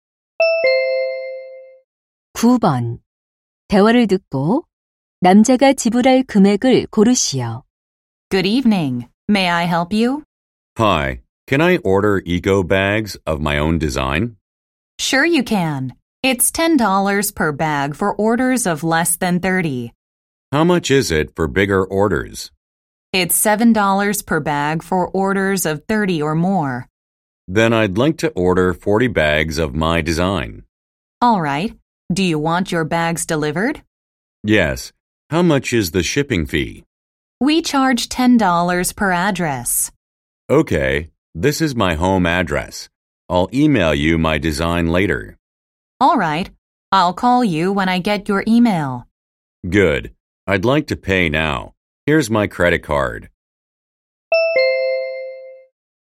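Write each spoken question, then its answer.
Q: 대화를 듣고 남자가 지불할 금액을 고르시오.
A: 290달러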